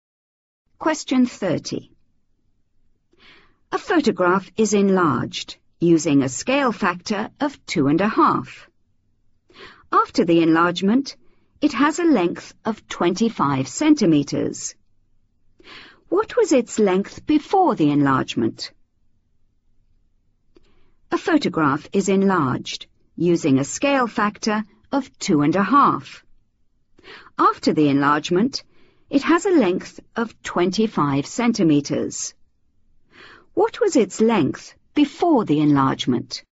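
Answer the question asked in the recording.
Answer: 10 cm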